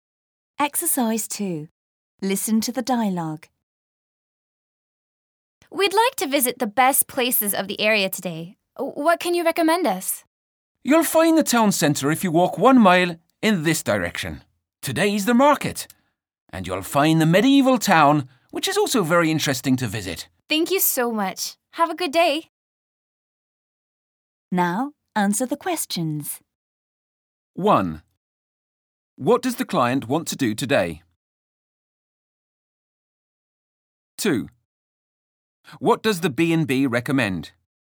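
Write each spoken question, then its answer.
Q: What does the client want to do today?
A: Visit the best places of the area

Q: What does the B&B recommend?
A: The town centre, the market and the medieval town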